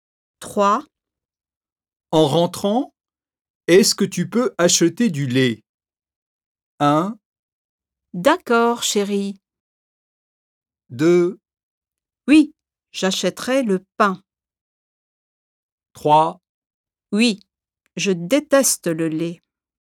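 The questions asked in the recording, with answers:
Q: En rentrant, est-ce que tu peux acheter du lait?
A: 1: D'accord, chérie.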